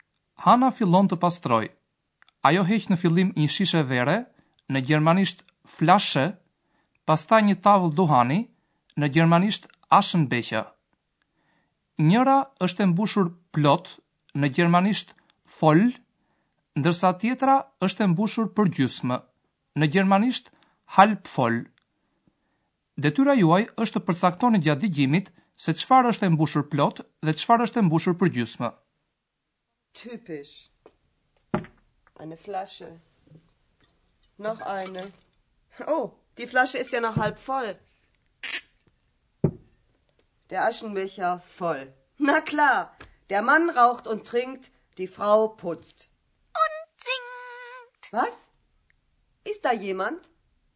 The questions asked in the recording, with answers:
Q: Detyra juaj është të përcaktoni gjatë digjimit se çfarë është e mbushur plot dhe çfarë është e mbushur për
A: Ajo që është plot është tavla e dohanit, nërsa ajo që është e mbushur për gjysma është shishja e verës.